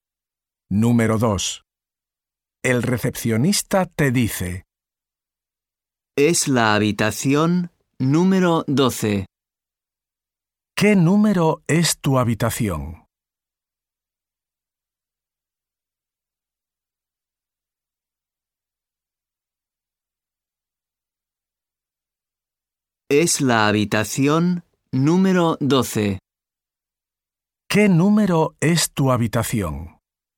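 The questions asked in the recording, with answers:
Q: ¿Qué número es tu habitación?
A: 12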